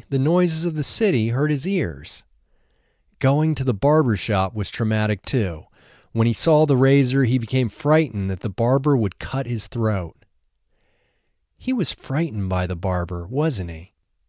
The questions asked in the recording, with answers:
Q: He was frightened by the barber, wasn't he?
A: Yes, he was frightened by the barber.